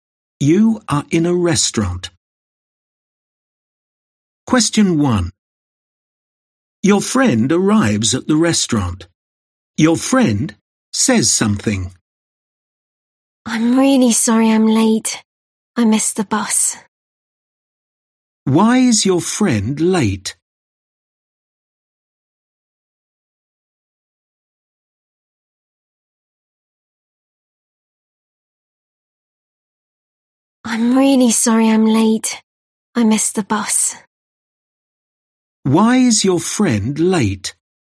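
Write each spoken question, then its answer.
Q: Why is your friend late?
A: Missed the bus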